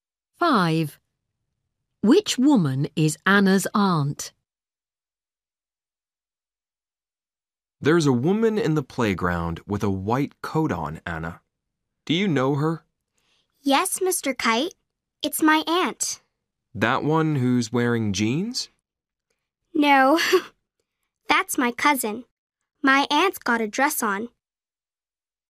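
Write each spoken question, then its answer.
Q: Which woman is Anna's aunt?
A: the woman with a white coat and a dress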